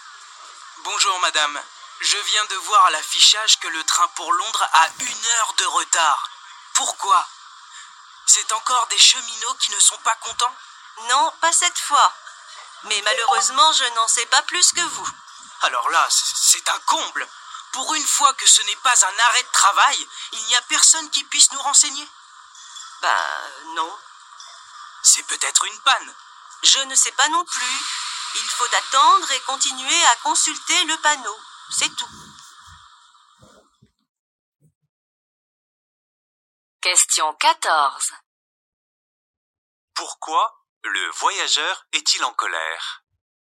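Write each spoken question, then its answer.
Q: Pourquoi Le voyageur est-il en colère?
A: Personne ne peut le renseigner sur le retard du train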